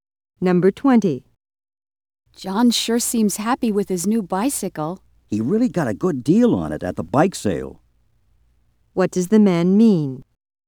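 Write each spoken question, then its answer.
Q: What does the man mean?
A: John bought the bicycle at a good price.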